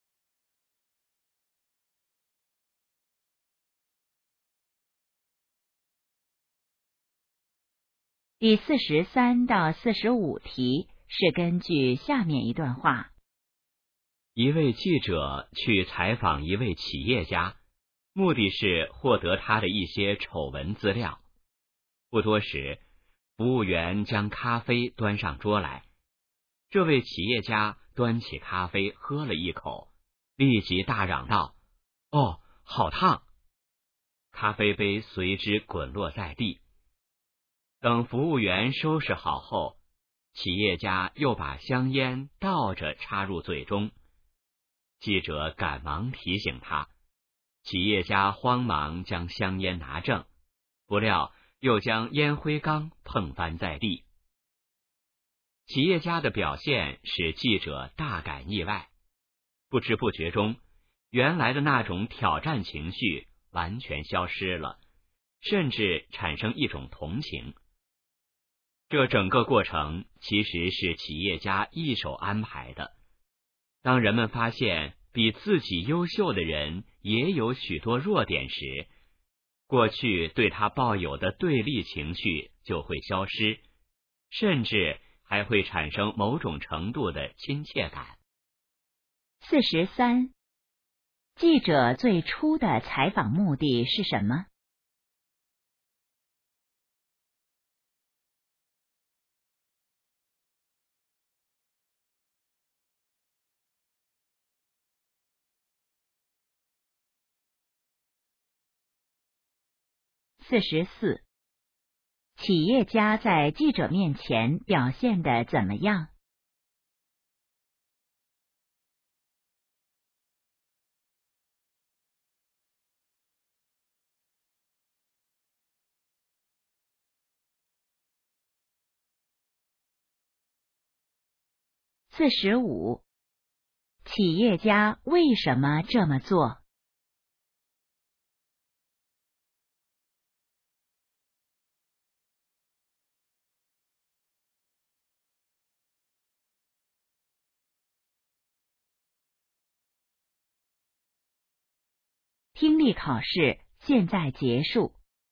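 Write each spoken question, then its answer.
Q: 记者最初的采访目的是什么?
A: 获得企业家的丑闻资料

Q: 企业家在记者面前表现得怎么样?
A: 笨手笨脚,一再出错

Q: 企业家为什么这么做?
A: 消除记者对他的对立情绪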